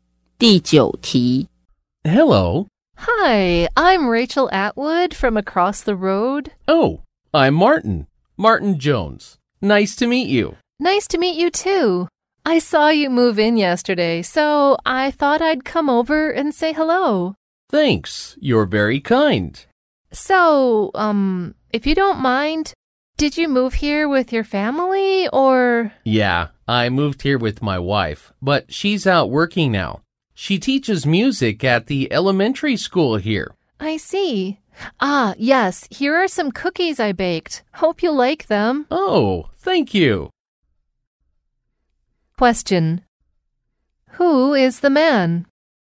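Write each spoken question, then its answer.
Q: Who is the man?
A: The woman's new neighbor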